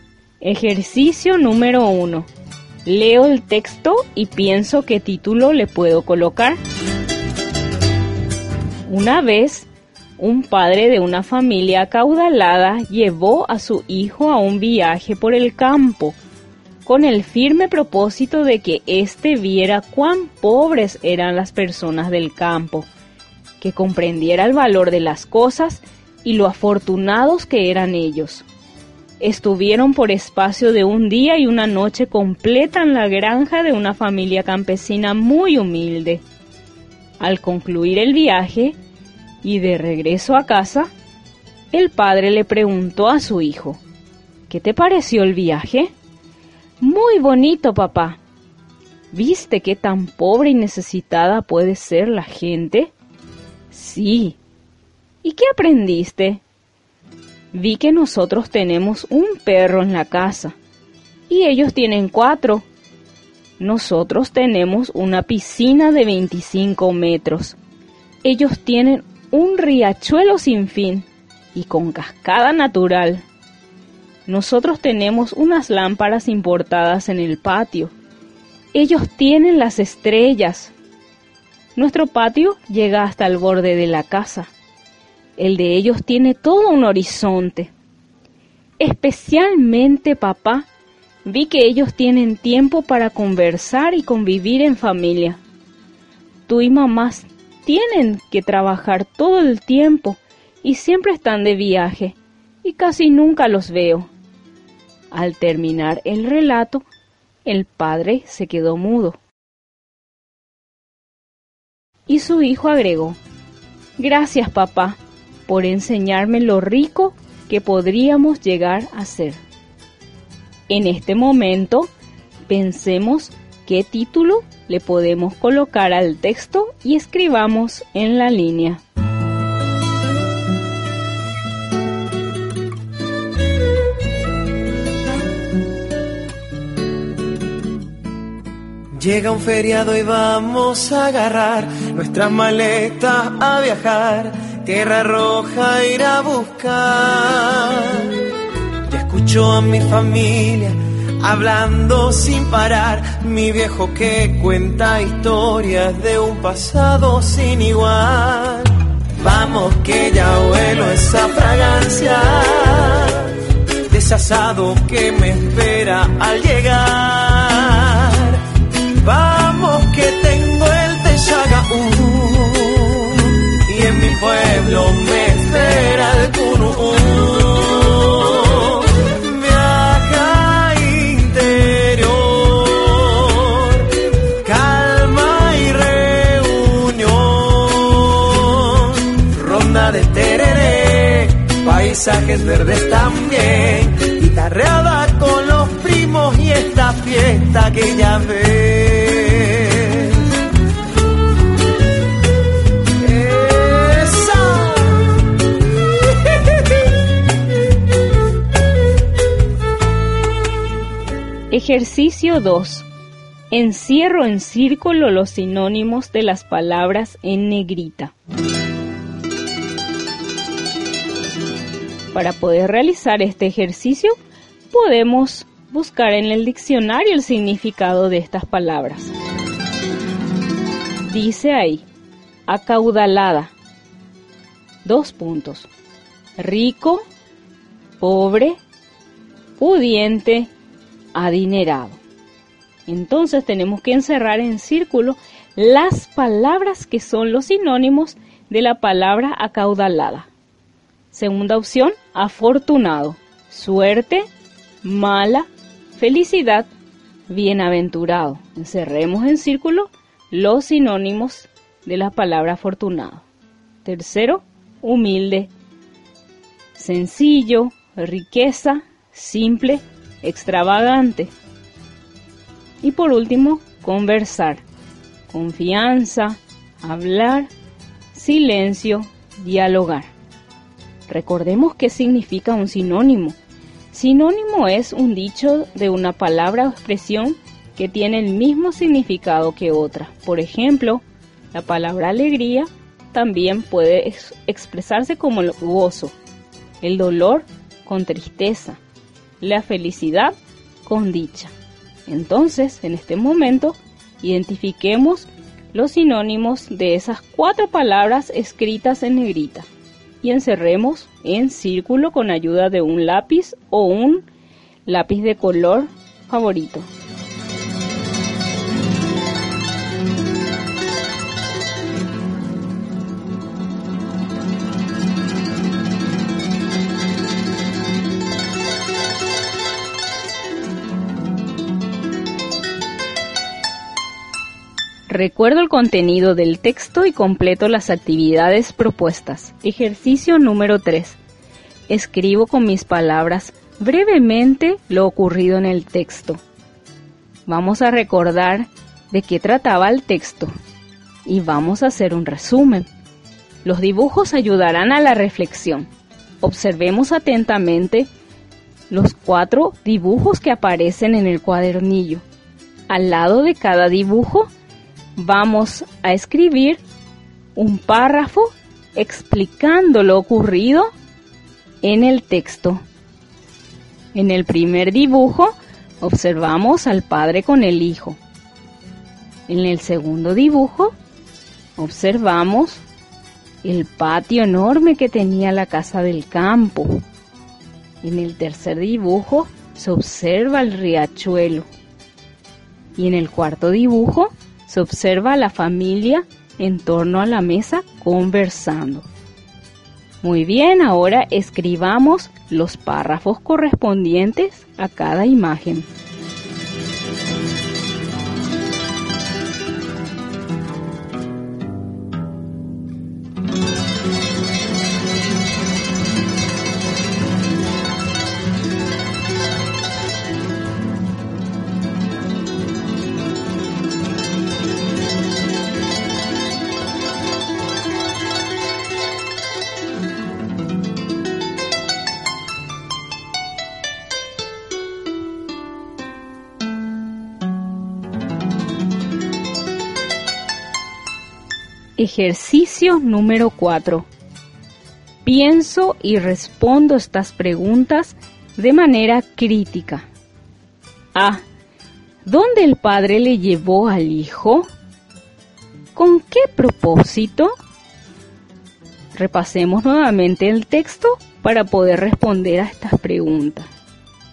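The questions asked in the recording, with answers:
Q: ¿Dónde el padre le llevó al hijo?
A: Al campo, a la granja de una familia campesina humilde

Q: ¿Con qué propósito?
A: Para que viera cuán pobres eran las personas del campo y comprendiera el valor de las cosas y lo afortunados que eran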